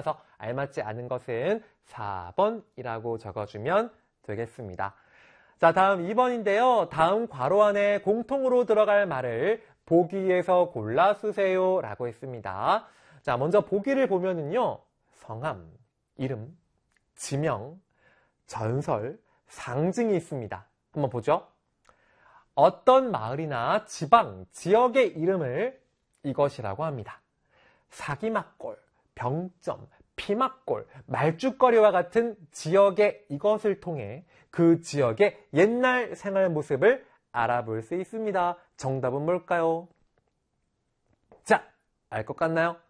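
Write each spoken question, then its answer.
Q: 다음 괄호 안에 공통으로 들어갈 말을 보기에서 골라 쓰세요라고 했습니다.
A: 지명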